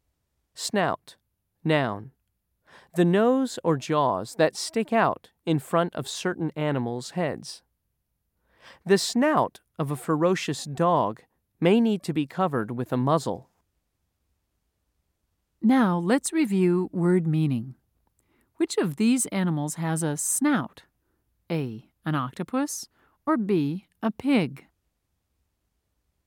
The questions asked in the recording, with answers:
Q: Which of these animals has a snout?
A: If you said B, you were correct.